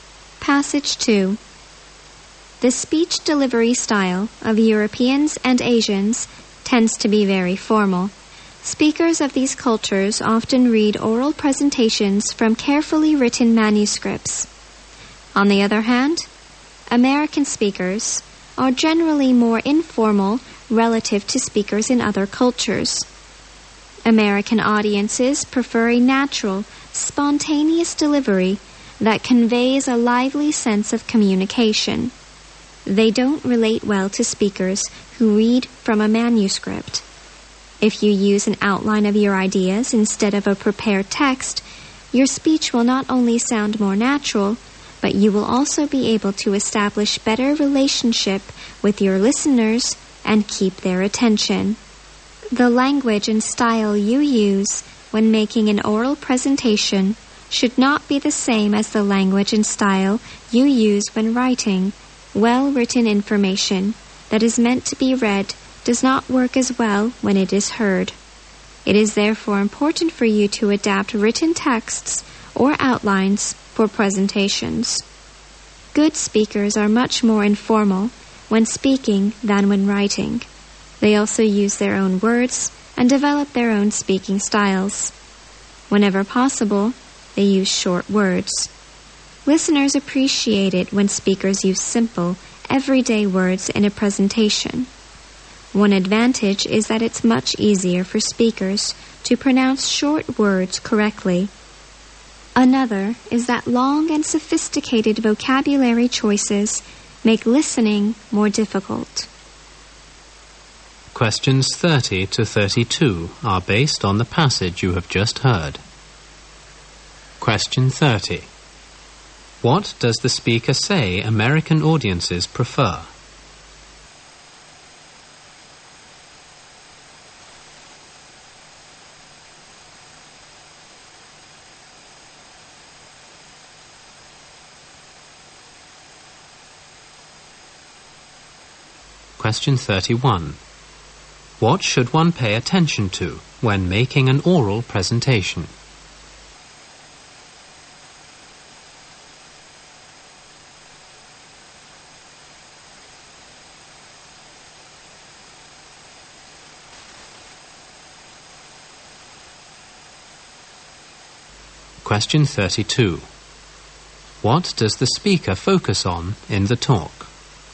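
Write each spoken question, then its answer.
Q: What does the speaker say American audiences prefer?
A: A natural, spontaneous delivery

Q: What does the speaker focus on in the talk?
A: Speech delivery style in oral presentations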